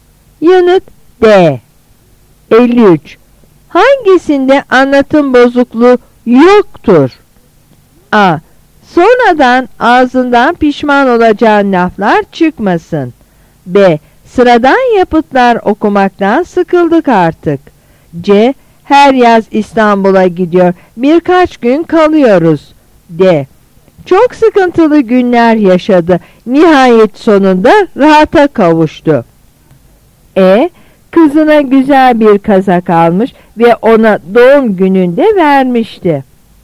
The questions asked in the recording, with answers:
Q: Hangisinde anlatım bozukluğu yoktur?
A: Yanıt B.